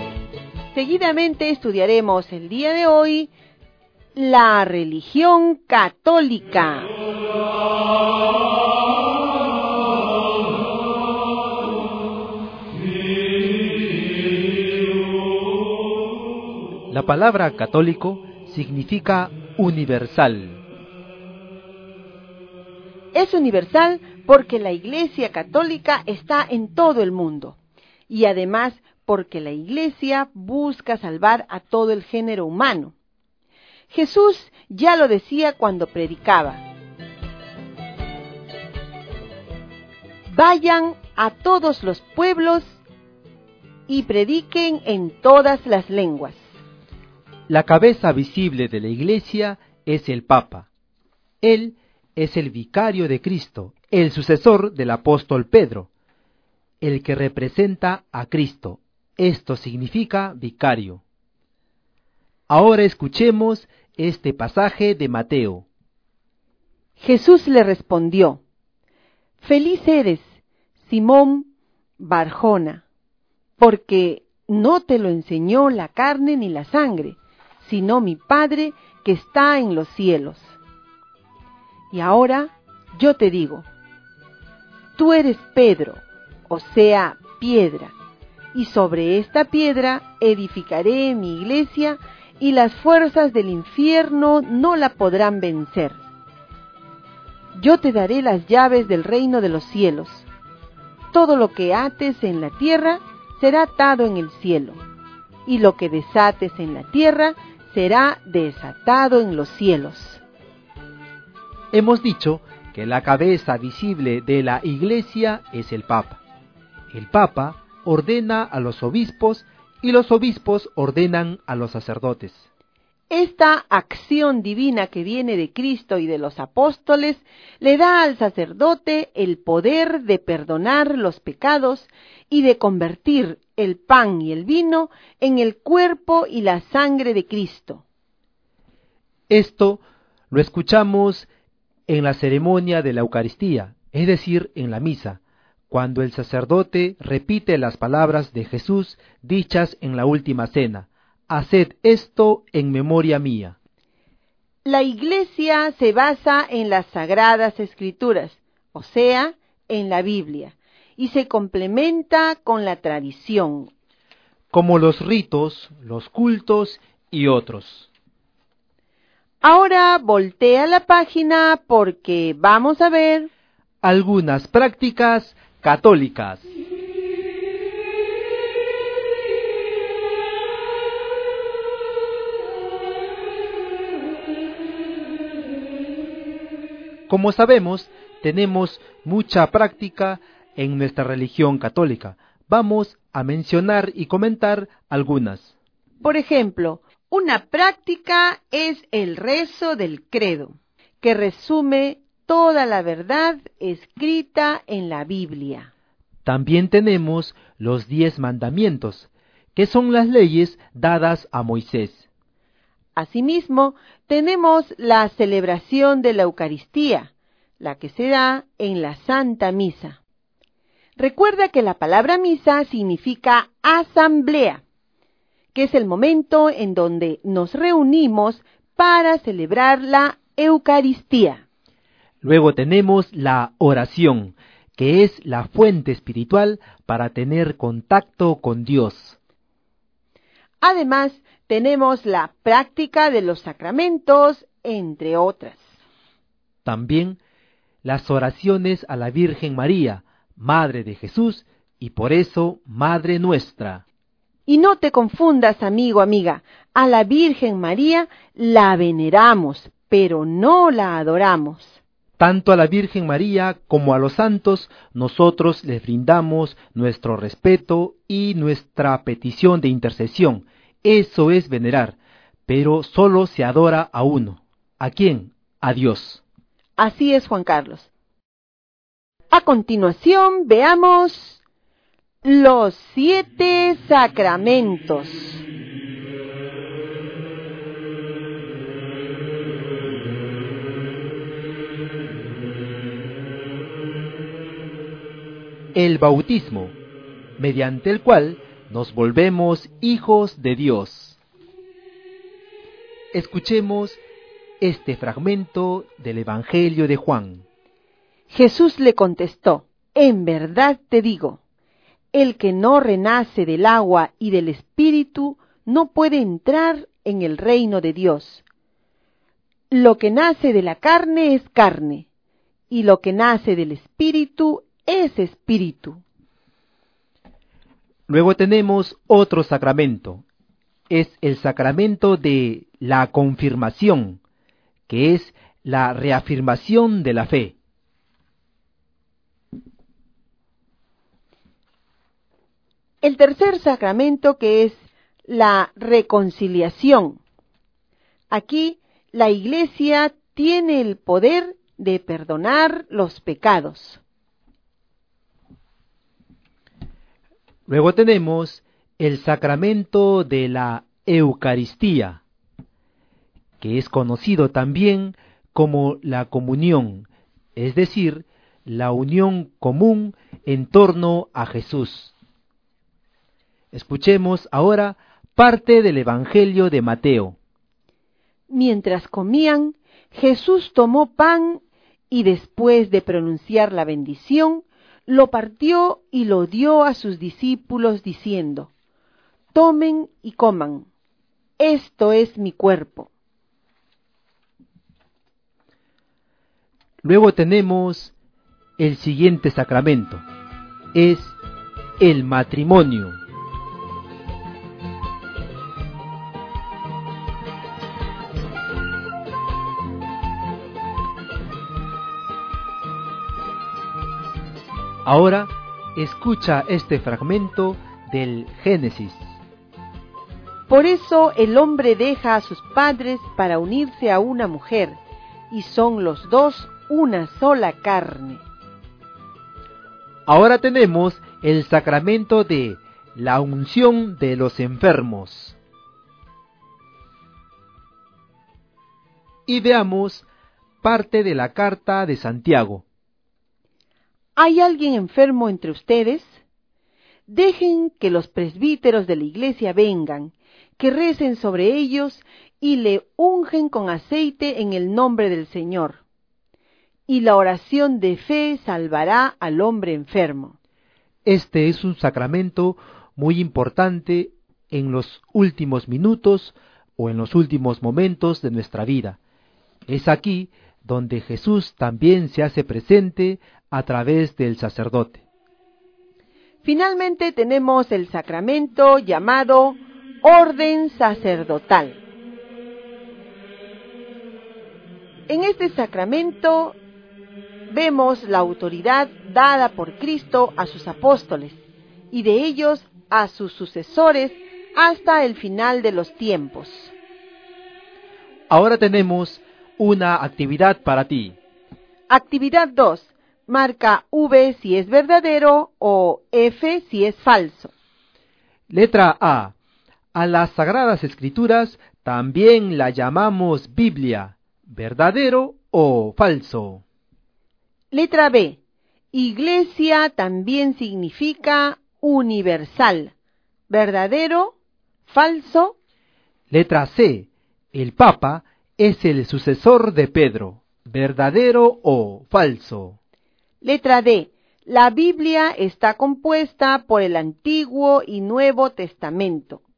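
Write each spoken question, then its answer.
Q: Letra A. A las Sagradas Escrituras también la llamamos Biblia. ¿Verdadero o falso?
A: Verdadero

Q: Letra B. Iglesia también significa universal. ¿Verdadero? ¿Falso?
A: Falso (católico significa universal)

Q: Letra C. El Papa es el sucesor de Pedro. ¿Verdadero o falso?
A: Verdadero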